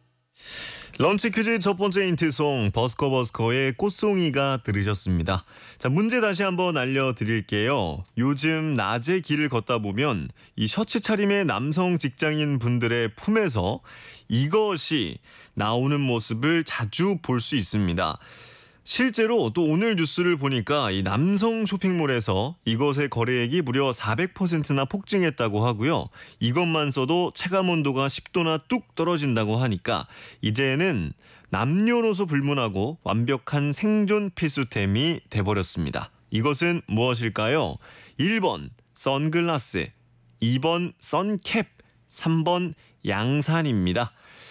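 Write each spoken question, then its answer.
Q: 이것은 무엇일까요?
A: 3: 양산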